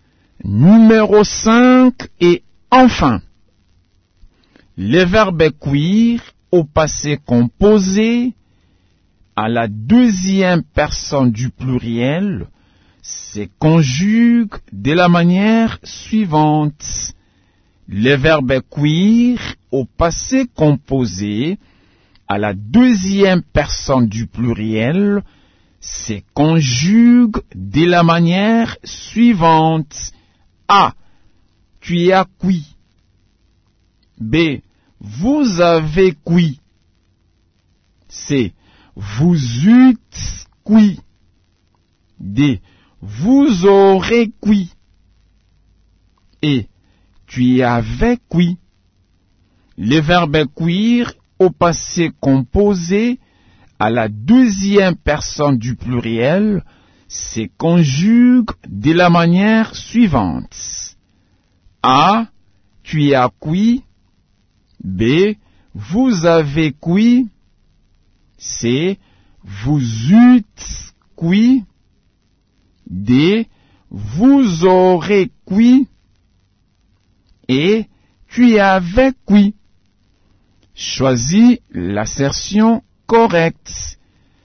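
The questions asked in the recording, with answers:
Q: Le verbe cuire au passé composé, à la deuxième personne du pluriel, se conjugue de la manière suivante.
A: B: Vous avez cuit.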